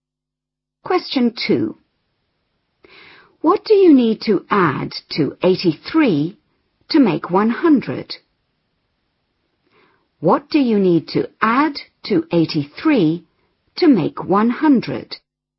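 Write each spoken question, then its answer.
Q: What do you need to add to 83 to make 100?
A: 17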